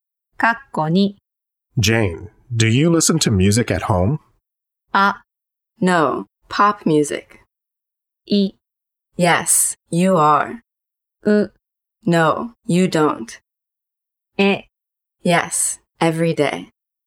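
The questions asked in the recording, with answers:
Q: Jane, do you listen to music at home?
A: え: Yes, every day.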